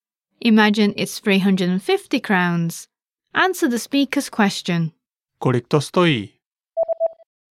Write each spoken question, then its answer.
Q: Kolik to stojí?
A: Stojí to 350 korun.